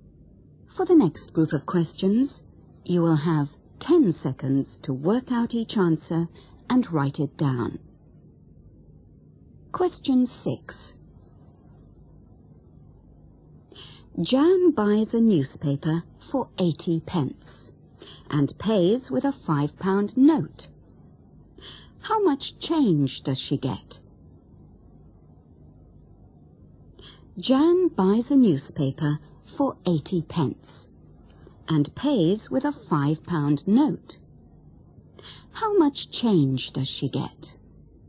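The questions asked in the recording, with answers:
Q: How much change does she get?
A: £4.20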